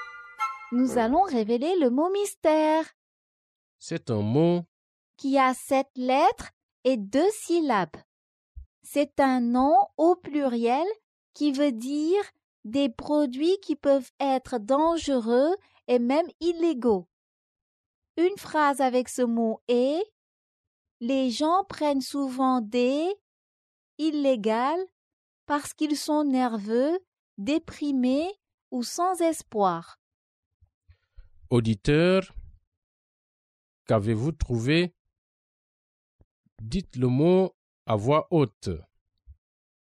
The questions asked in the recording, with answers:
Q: Auditeur, qu'avez-vous trouvé?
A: Le mot mystère est drogue.